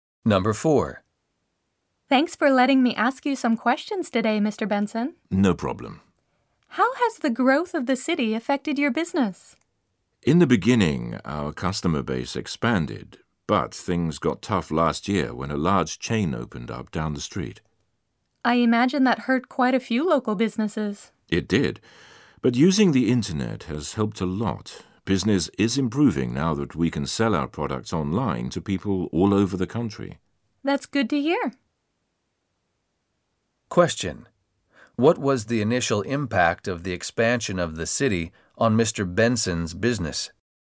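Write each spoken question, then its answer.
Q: What was the initial impact of the expansion of the city on Mr. Benson's business?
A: His customer base expanded.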